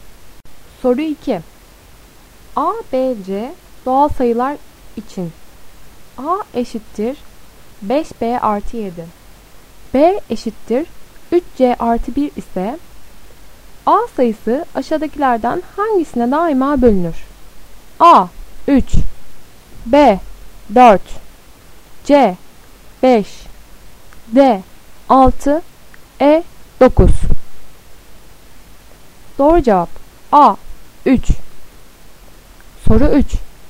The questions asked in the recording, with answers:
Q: A eşittir 5B artı 7. B eşittir 3C artı 1 ise A sayısı aşağıdakilerden hangisine daima bölünür?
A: Doğru cevap A. 3.